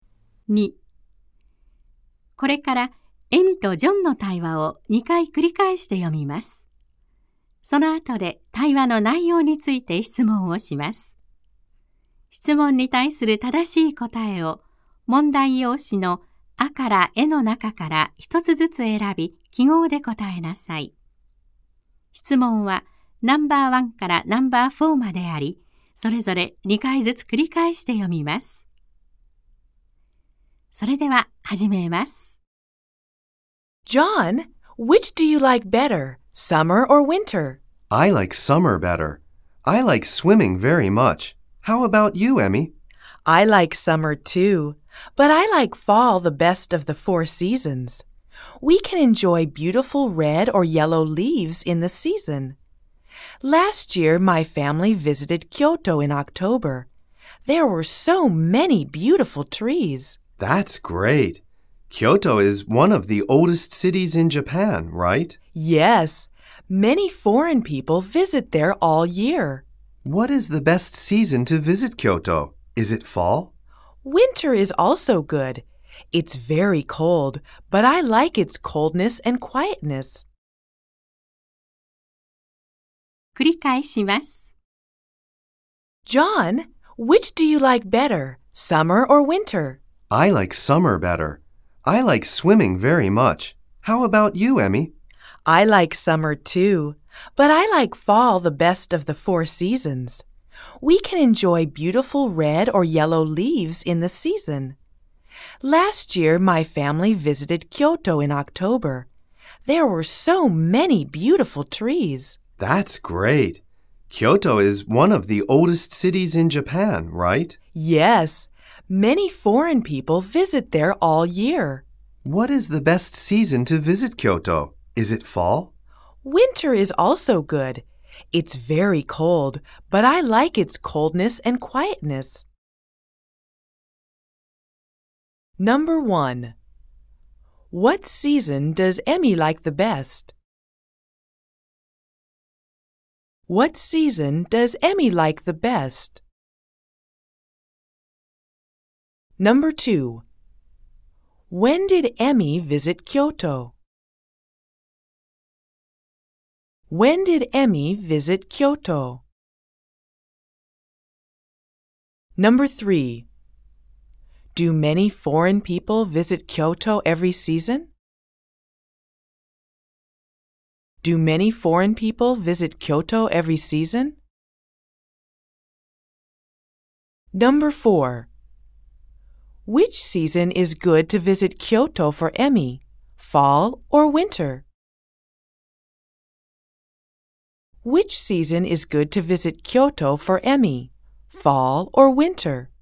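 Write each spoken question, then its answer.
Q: What season does Emmy like the best?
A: Fall

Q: When did Emmy visit Kyoto?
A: Last year, in October

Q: Do many foreign people visit Kyoto every season?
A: Yes, they do.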